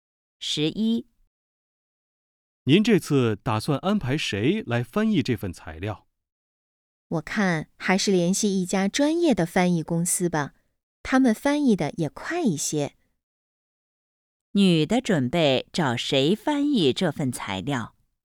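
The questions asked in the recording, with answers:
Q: 女的准备找谁翻译这份材料?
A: 专业的翻译公司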